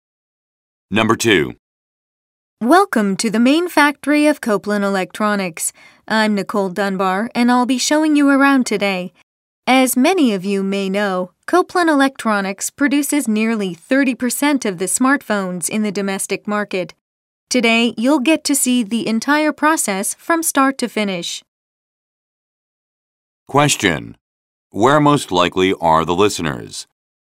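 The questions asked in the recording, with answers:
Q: Where most likely are the listeners?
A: At the main factory of Copeland Electronics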